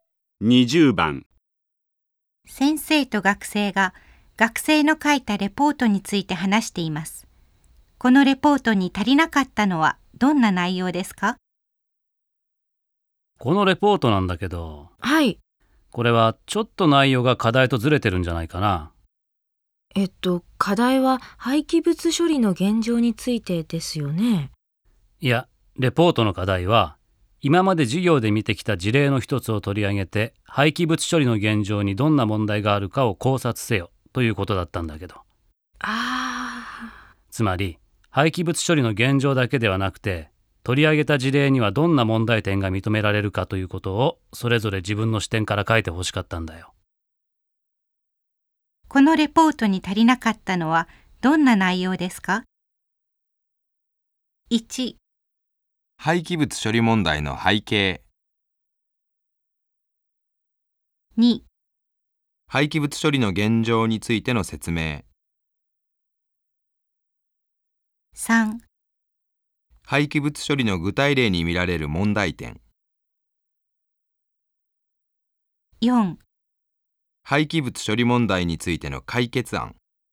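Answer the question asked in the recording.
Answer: 3: 廃棄物処理の具体例に見られる問題点。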